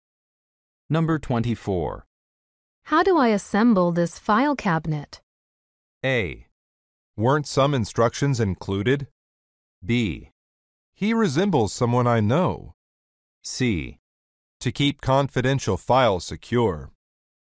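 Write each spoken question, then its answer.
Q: How do I assemble this file cabinet?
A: A: Weren't some instructions included?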